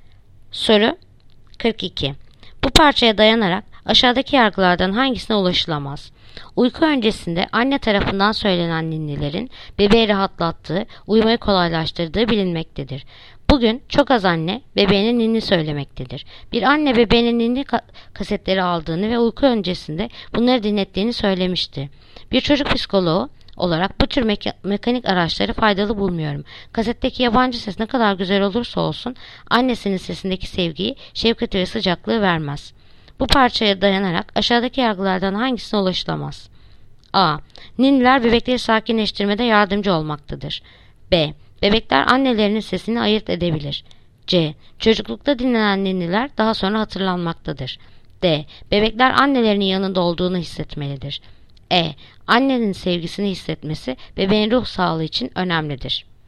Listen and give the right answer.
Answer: Yanıt: Ceyhan. Çocuklukta dinlenen ninniler daha sonra hatırlanmaktadır.